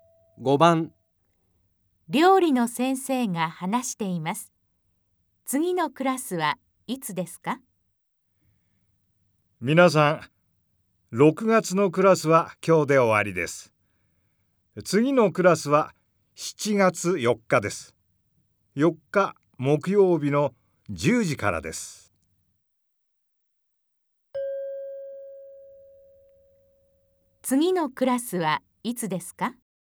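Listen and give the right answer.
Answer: 7月4日(木曜日)10時から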